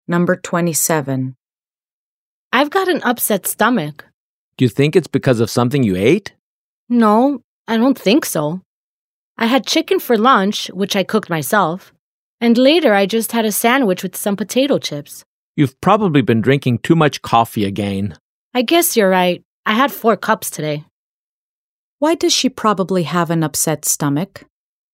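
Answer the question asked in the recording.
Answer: She drank too much coffee (4 cups today).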